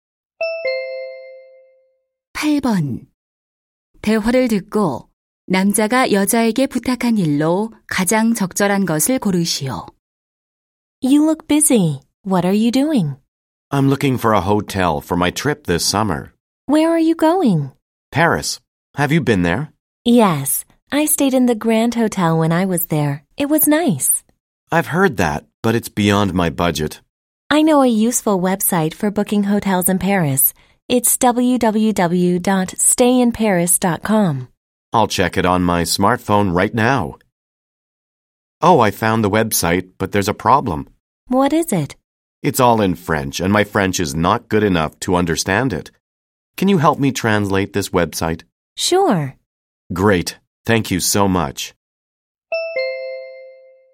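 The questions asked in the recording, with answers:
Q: 대화를 듣고 남자가 여자에게 부탁한 일로 가장 적절한 것을 고르시오.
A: 프랑스어 웹사이트 번역하기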